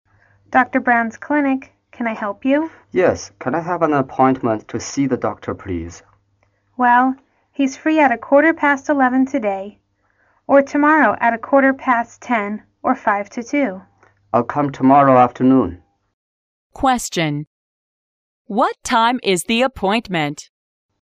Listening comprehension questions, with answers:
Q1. What time is the appointment?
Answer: 1:55.

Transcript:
W: Dr. Brown's Clinic. Can I help you?
M: Yes. Can I have an appointment to see the doctor, please?
W: Well, he's free at a quarter past eleven today or tomorrow at a quarter past ten or five to two.
M: I'll come tomorrow afternoon.
Question: What time is the appointment?